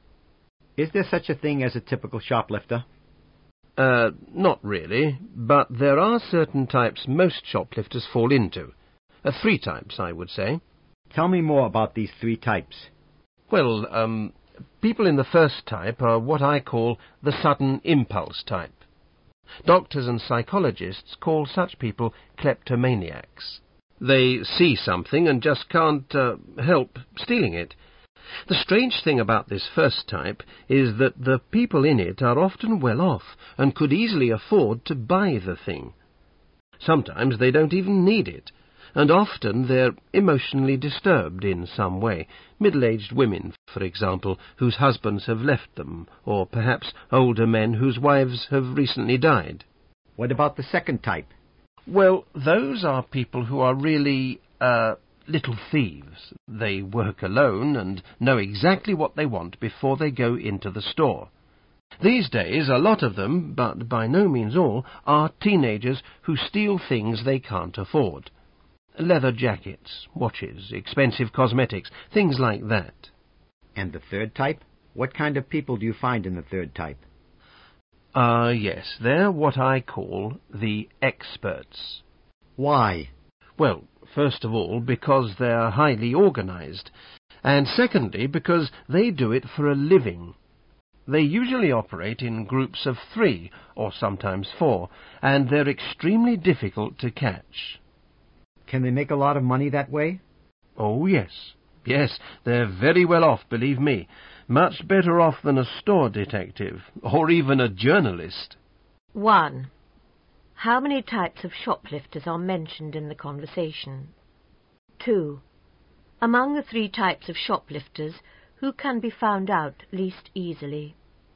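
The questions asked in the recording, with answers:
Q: How many types of shoplifters are mentioned in the conversation?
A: Three

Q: Among the three types of shoplifters, who can be found out least easily?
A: The experts (third type)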